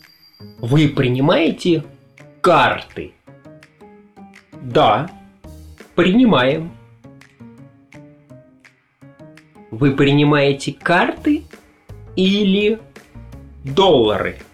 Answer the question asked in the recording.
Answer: Карты. Принимаем карты.